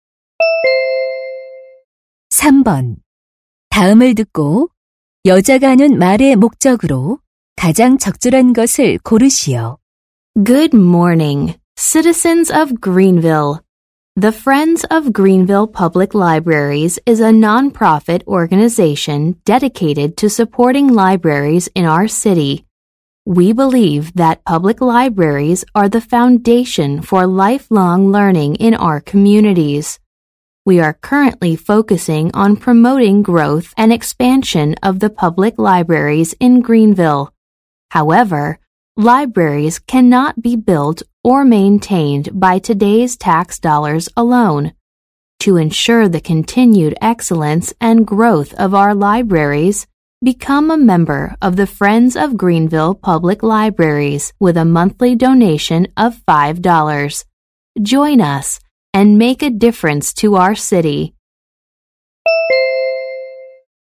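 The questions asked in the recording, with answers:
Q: 다음을 듣고 여자가 하는 말의 목적으로 가장 적절한 것을 고르시오.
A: 도서관 후원 단체 회원 가입(월 5달러 기부) 권유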